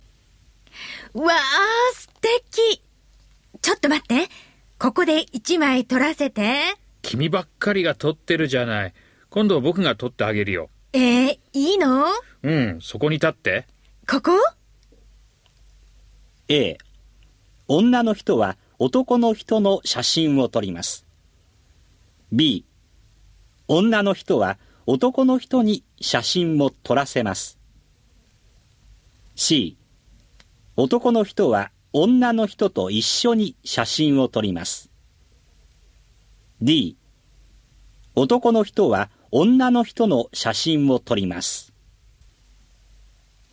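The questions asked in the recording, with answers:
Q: A、女の人は男の人の写真を撮ります。B、女の人は男の人に写真も撮らせます。 C、男の人は女の人と一緒に写真を撮ります。D、男の人は女の人の写真を撮ります。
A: D: 男の人は女の人の写真を撮ります。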